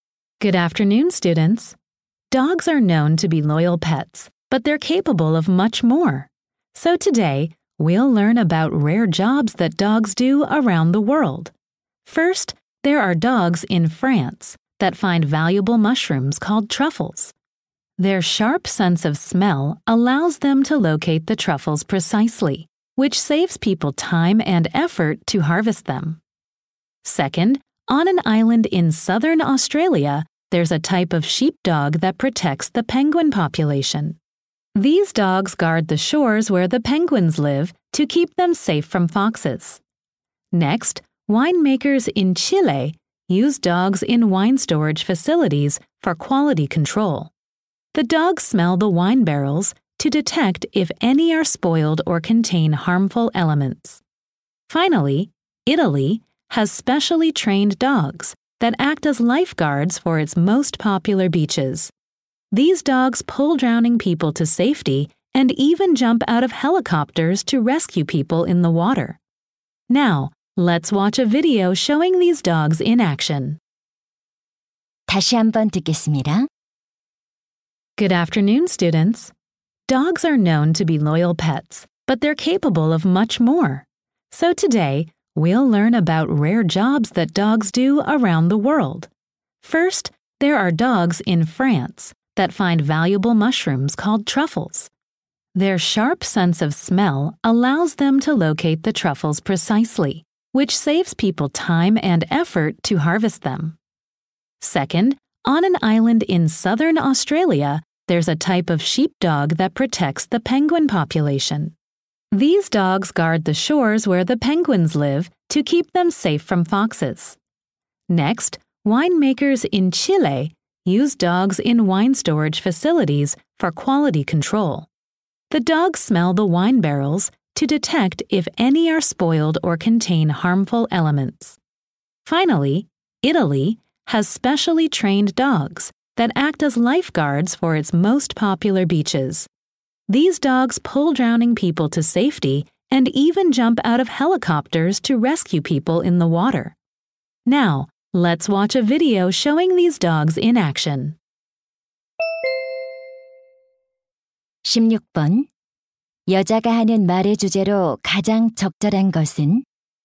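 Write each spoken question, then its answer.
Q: 여자가 하는 말의 주제로 가장 적절한 것은?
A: 세계 여러 곳에서 개들이 하는 특이한 일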